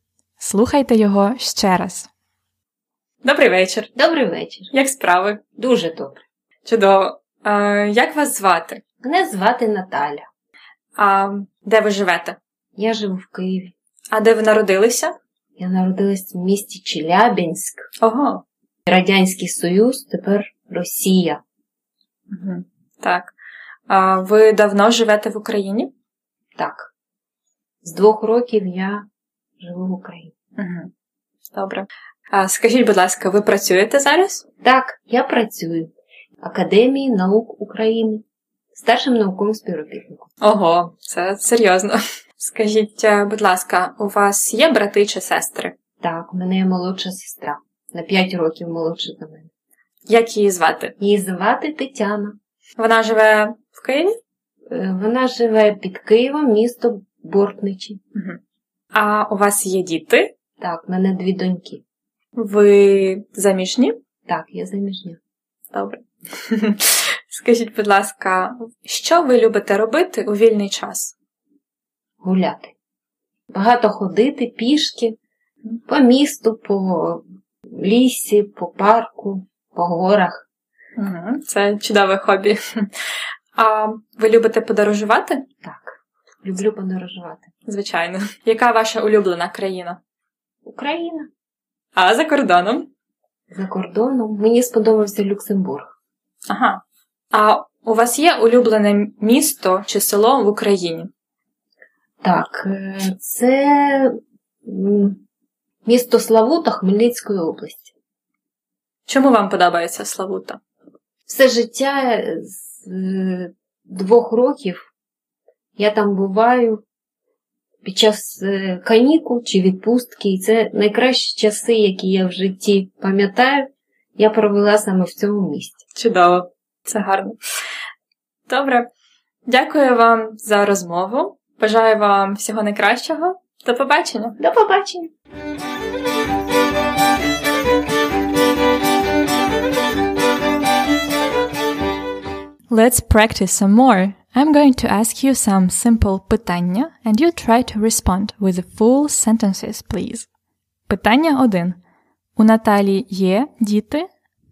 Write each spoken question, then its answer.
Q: У Наталі є діти?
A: Так, у неї є дві доньки.